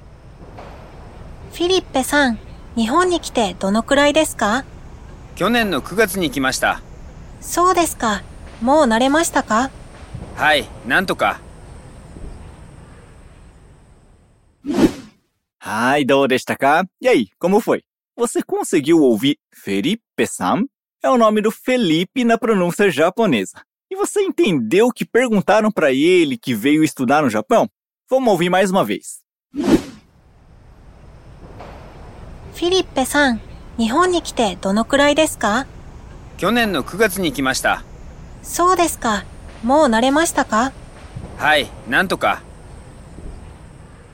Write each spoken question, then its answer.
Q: E você entendeu o que perguntaram pra ele que veio estudar no Japão?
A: Felipe, você tá aqui no Japão já há quanto tempo?